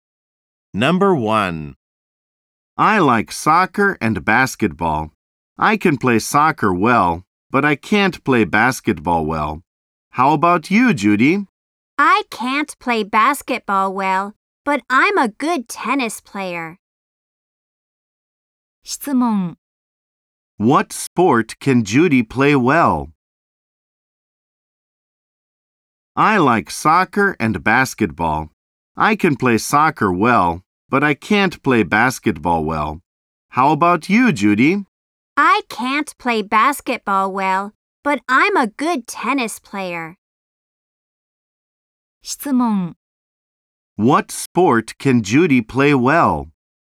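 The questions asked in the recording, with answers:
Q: What sport can Judy play well?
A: Tennis.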